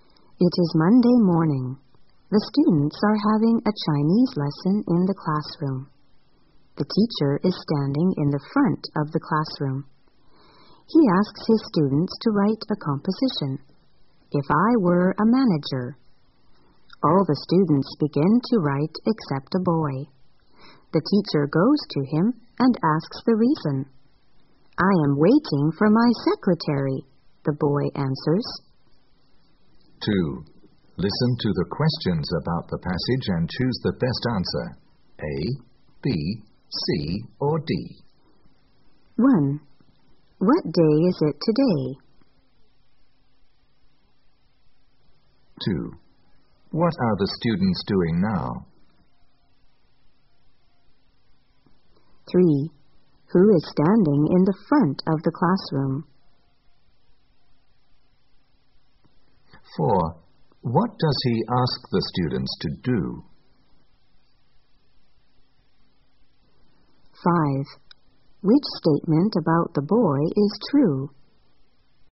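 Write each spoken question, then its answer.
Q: What day is it today?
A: Monday

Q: What are the students doing now?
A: Having a Chinese lesson

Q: Who is standing in the front of the classroom?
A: The teacher

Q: What does he ask the students to do?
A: Write a composition, "If I were a manager"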